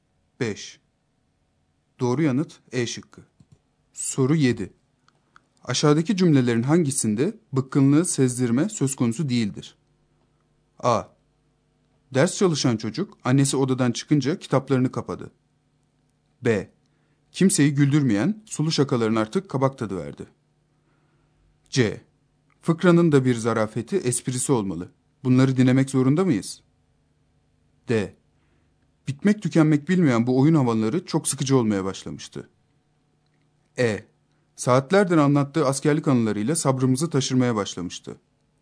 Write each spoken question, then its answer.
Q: Aşağıdaki cümlelerin hangisinde bıkkınlığı sezdirme söz konusu değildir?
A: Doğru yanıt A şıkkı.